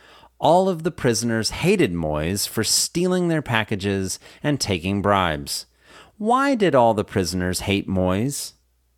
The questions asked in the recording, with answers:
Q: Why did all the prisoners hate Moyes?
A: All the prisoners hated Moyes for stealing their packages and taking bribes.